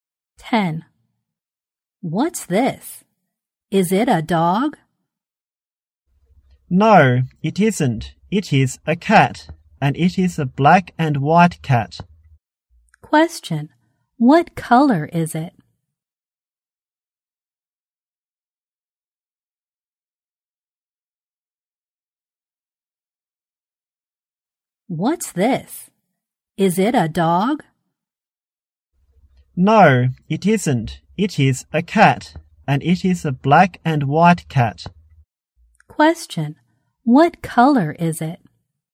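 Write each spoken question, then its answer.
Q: Question, what color is it?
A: Black and white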